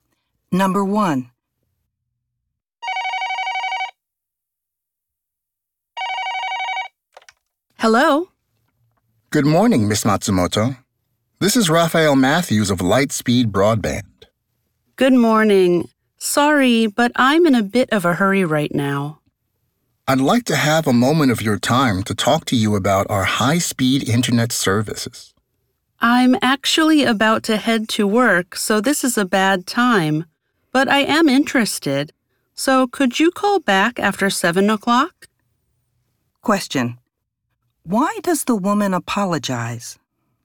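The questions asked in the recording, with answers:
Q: Why does the woman apologize?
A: She is in a hurry because she is about to leave for work.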